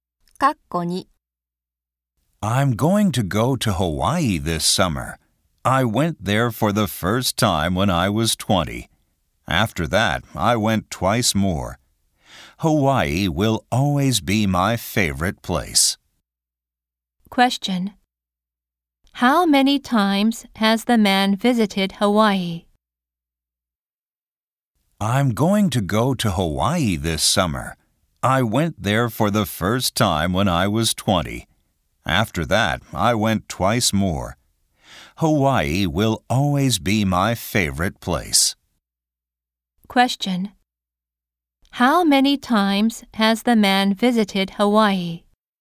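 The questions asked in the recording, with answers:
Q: How many times has the man visited Hawaii?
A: Three times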